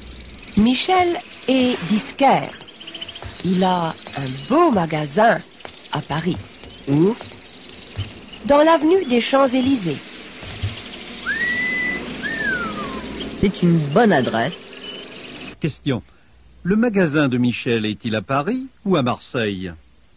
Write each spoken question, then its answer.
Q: Question : le magasin de Michel est-il à Paris ou à Marseille ?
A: Il est à Paris.